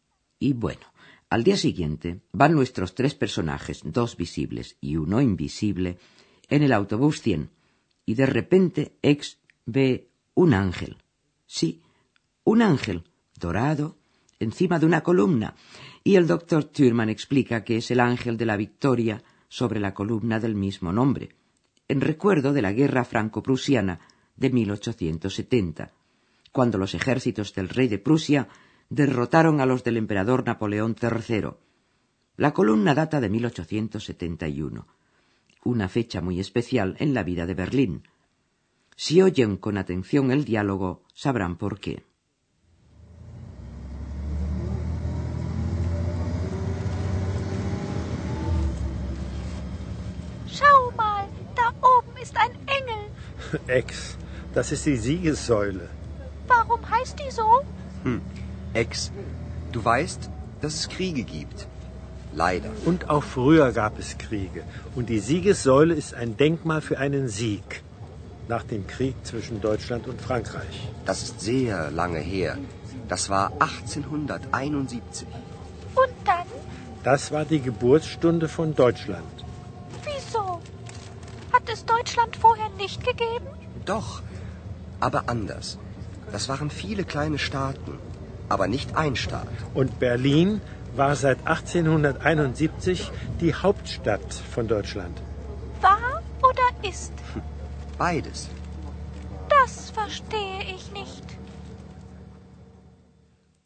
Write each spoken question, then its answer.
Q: Si oyen con atención el diálogo, sabrán por qué.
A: fue la hora, digamos, natal de Alemania, y Berlín se convirtió en la capital del imperio.